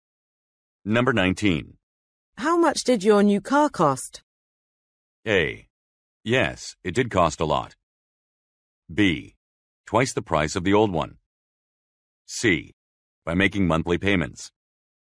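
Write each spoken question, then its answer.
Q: How much did your new car cost?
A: B: Twice the price of the old one.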